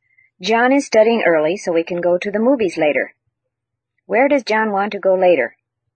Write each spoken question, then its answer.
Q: Where does John want to go later?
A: He wants to go to the movies.